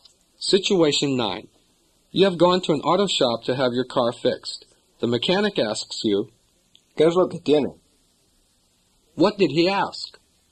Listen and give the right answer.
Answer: He asked, what's wrong with it?